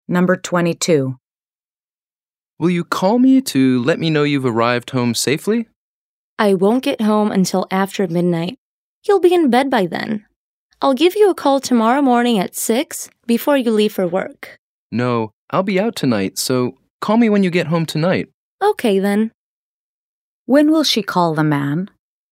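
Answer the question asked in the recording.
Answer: Tonight, when she gets home after midnight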